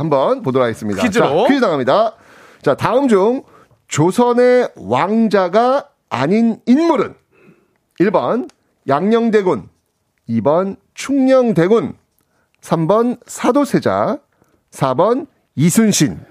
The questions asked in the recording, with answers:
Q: 자, 다음 중, 조선의 왕자가 아닌 인물은?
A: 그래서 정답은 4번 이순신입니다.